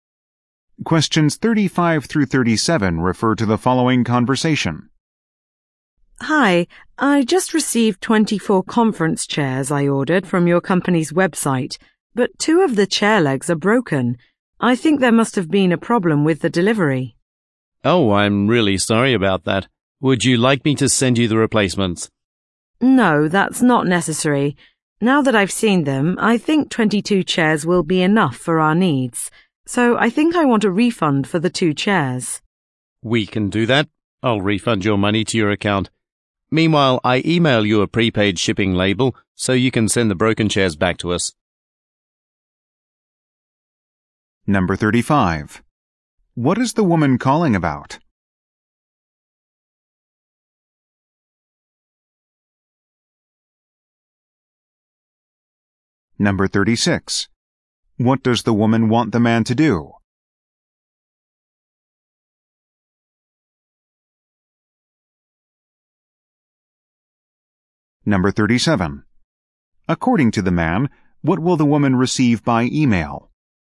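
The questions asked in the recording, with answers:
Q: What is the woman calling about?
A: Some chairs arrived broken

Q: What does the woman want the man to do?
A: Refund the two chairs

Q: According to the man, what will the woman receive by email?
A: A prepaid shipping label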